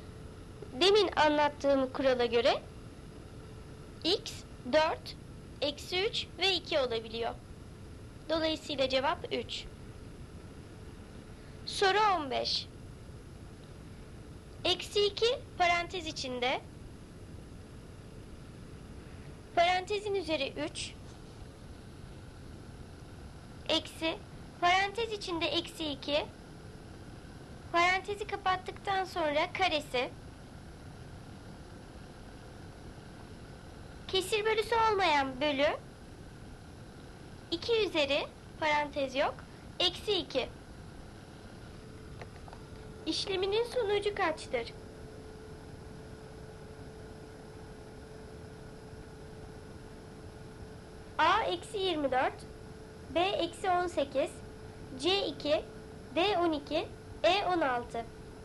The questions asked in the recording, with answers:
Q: İşleminin sonucu kaçtır?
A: Doğru cevap A eksi 24.